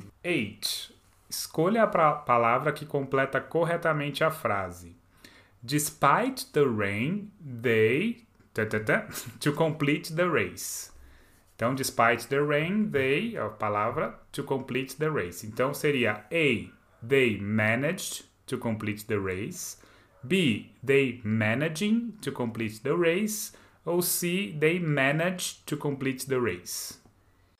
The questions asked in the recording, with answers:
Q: Escolha a palavra que completa corretamente a frase.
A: Uh, letter A. They manage to complete the race.